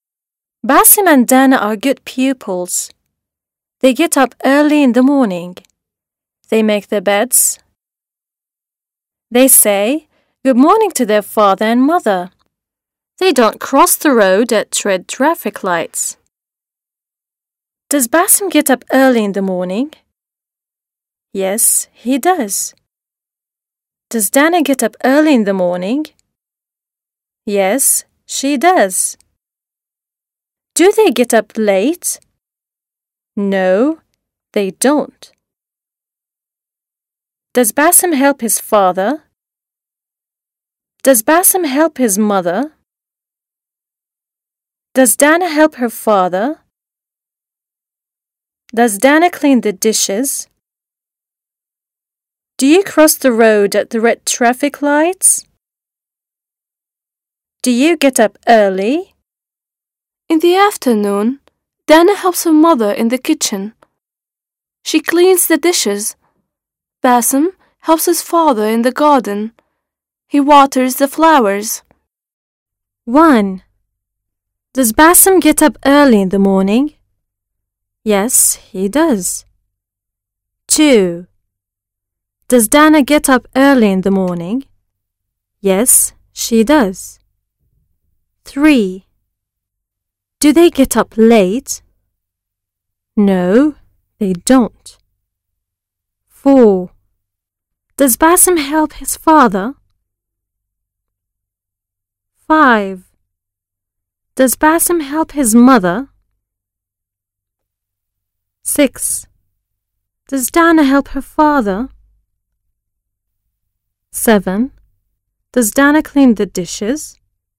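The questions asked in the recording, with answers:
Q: Does Basim help his father?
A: Yes, he does.

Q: Does Dana clean the dishes?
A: Yes, she does.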